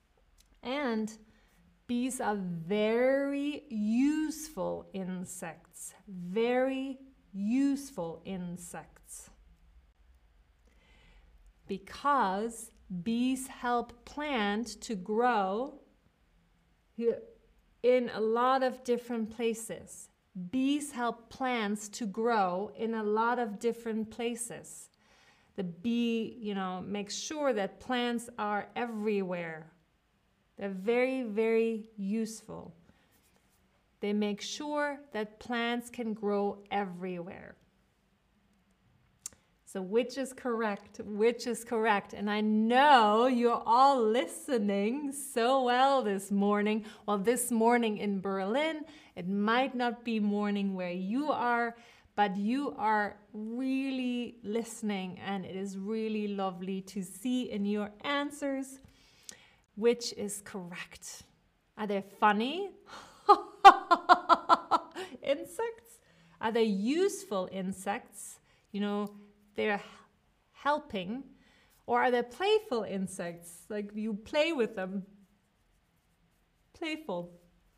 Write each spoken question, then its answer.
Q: Are they funny?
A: Bees are useful insects because they help plants grow everywhere.